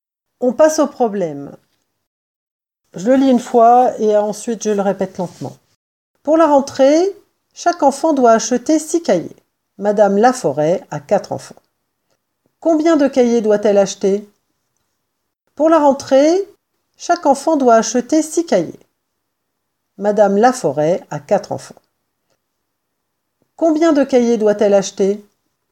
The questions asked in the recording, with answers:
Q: Combien de cahiers doit-elle acheter?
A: elle doit acheter 24 cahiers.